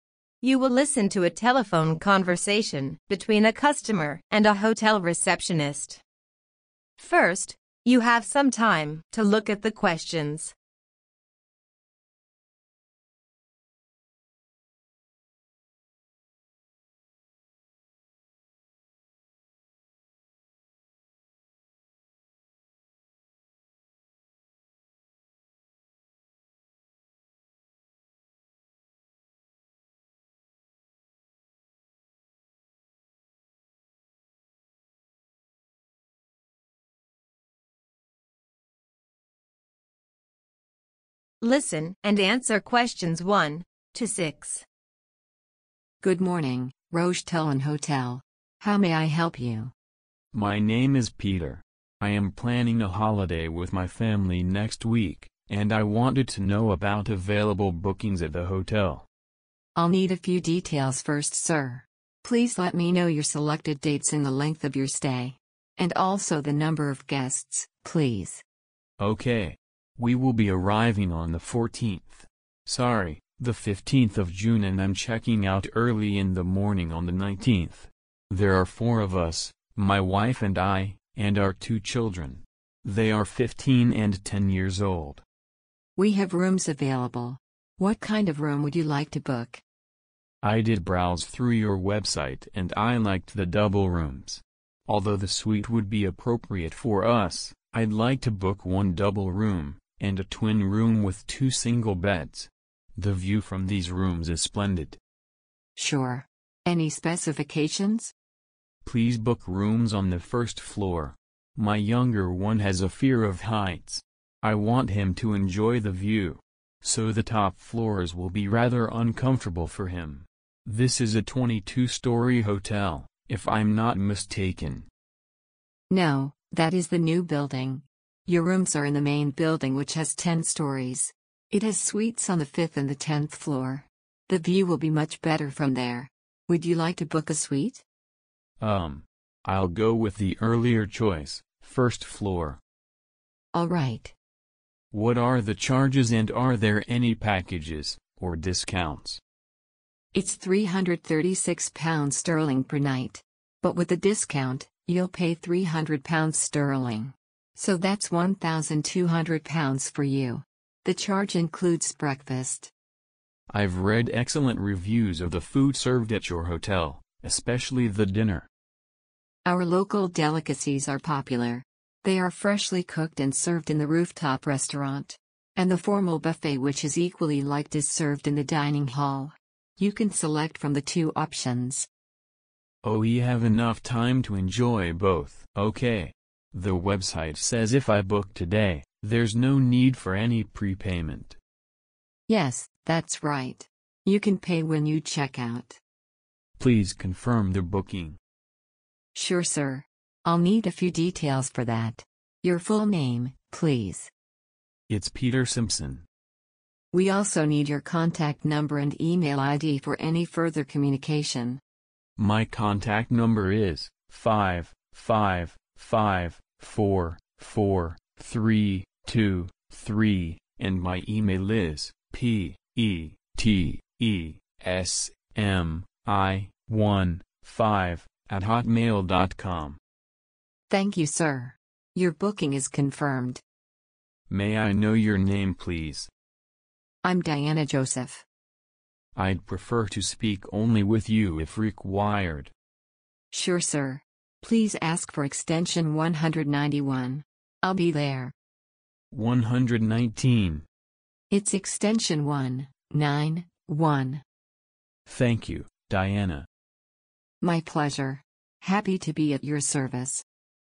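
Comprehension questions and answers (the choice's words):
Choose the correct letter, A, B or C.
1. Peter and his family will be on holiday for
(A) two davs.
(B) four days.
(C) five days.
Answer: four days.

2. The customer wants rooms on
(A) the first floor.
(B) the fifth floor.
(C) the tenth floor.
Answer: the first floor.

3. The new building has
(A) 10 floors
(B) 22 floors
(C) 2 suites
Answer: 22 floors

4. The rooftop restaurant is famous for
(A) local crafts.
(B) the native dishes.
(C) the formal buffets.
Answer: the native dishes.

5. Peter can make the payment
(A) in advance.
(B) at the time of booking.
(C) while checking out.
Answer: while checking out.

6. Further communication is possible on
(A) extension 119.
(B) extension 911.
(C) extension 191.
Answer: extension 191.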